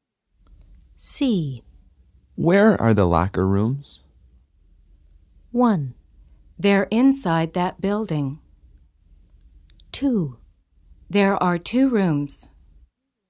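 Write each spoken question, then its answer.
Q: Where are the locker rooms?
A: 1: They're inside that building.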